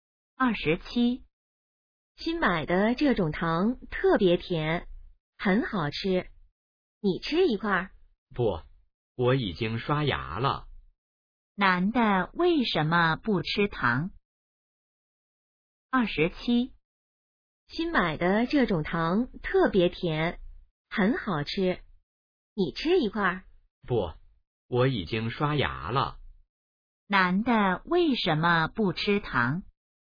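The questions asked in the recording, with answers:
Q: 男的为什么不吃糖?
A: 已经刷牙了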